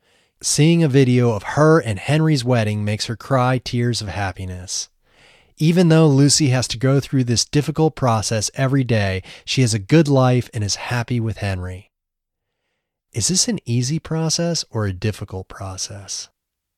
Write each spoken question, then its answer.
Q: Is this an easy process or a difficult process?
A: This is a difficult process.